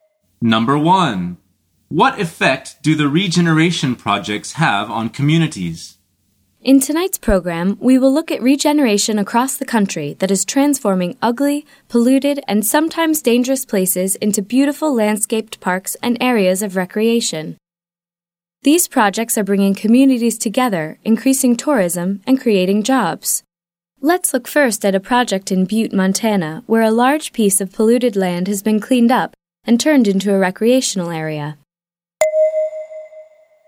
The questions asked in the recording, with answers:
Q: What effect do the regeneration projects have on communities?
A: The answer is they bring them together.